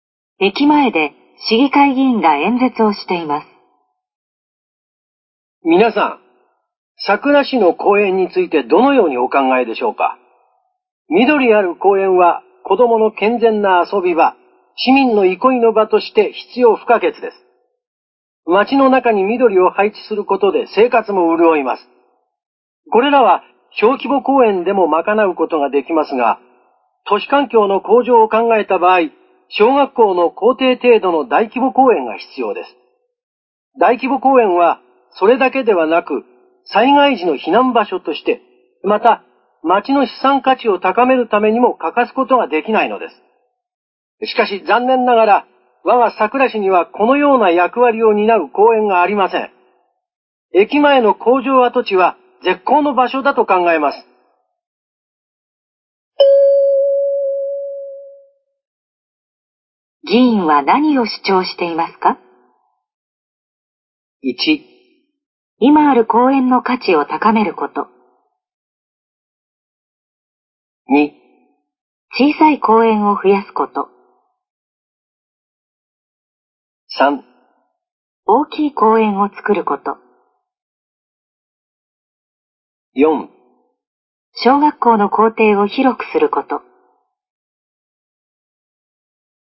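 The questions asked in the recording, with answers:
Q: 議員は何を主張していますか?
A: 3: 大きい公園を作ること。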